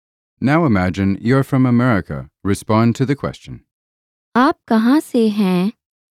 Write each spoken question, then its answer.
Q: आप कहाँ से हैं?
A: मैं America से हूँ.